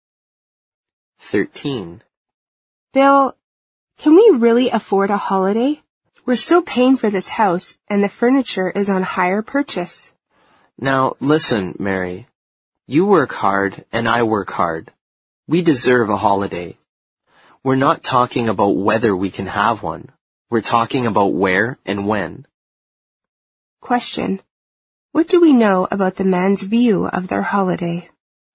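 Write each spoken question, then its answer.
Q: What do we know about the man's view of their holiday?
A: He thinks they deserve one and will definitely go; only where and when are undecided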